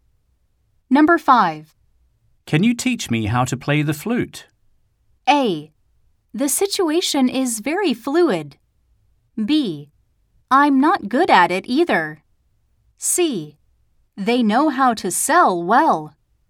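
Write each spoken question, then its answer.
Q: Can you teach me how to play the flute?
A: B: I'm not good at it either.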